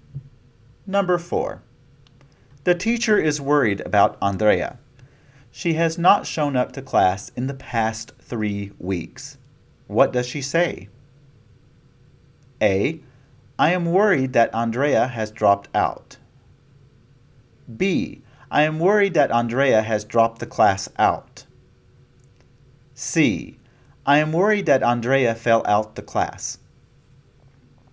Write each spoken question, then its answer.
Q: What does she say?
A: You should have chosen A.